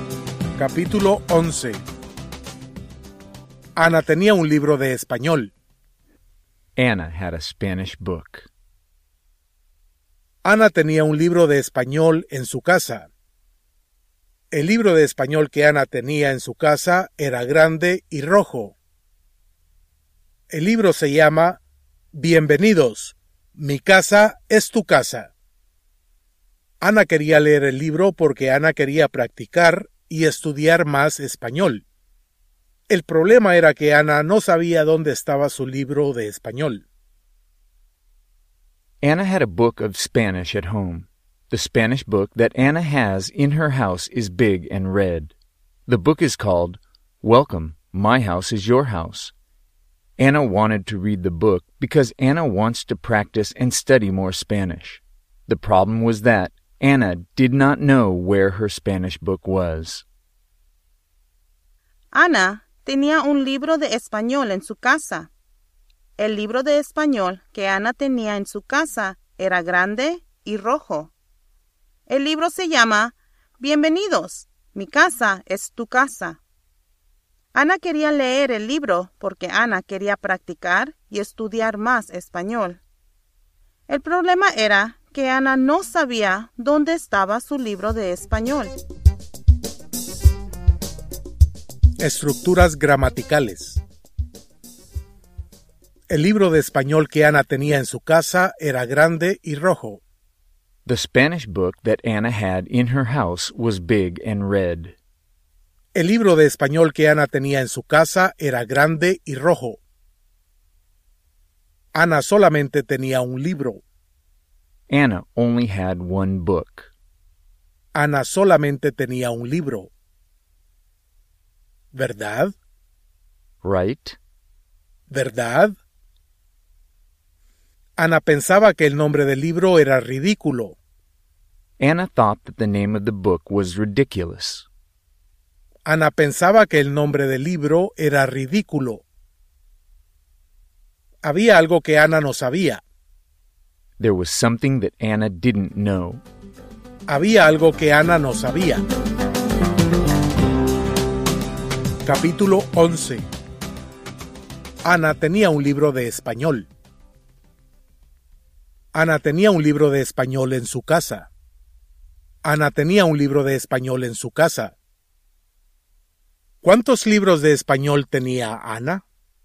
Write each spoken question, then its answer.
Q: ¿Cuántos libros de español tenía Ana?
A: Ana solamente tenía un libro de español.